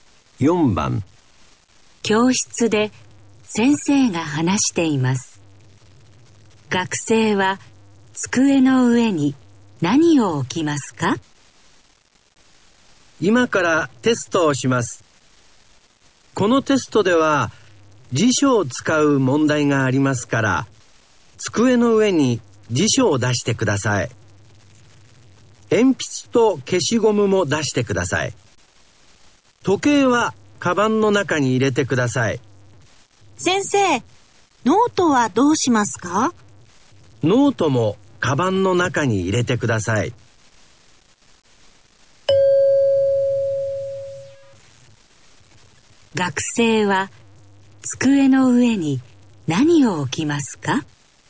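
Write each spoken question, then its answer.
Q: 学生は机の上に何を置きますか?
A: 辞書と鉛筆と消しゴム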